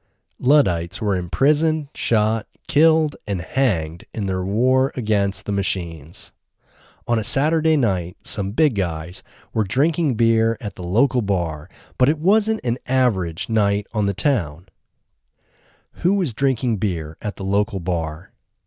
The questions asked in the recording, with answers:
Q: Who was drinking beer at the local bar?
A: Some big guys were drinking beer at the local bar.